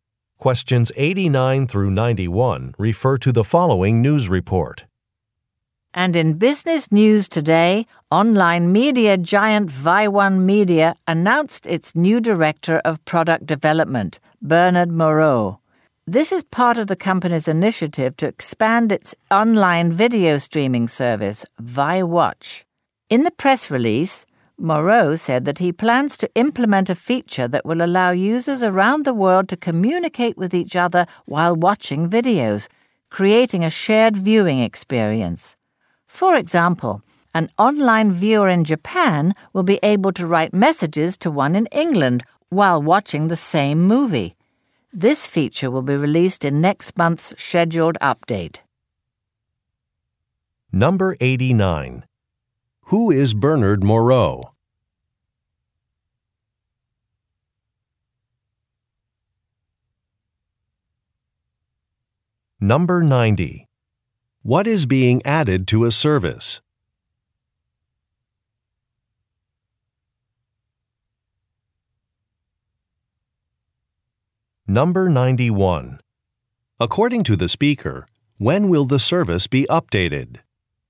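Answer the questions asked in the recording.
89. The new director of product development
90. A feature that lets users communicate while watching videos
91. Next month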